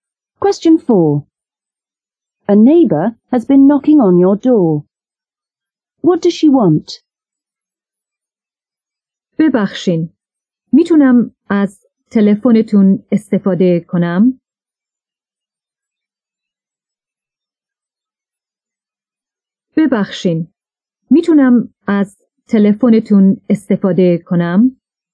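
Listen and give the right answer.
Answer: To use your telephone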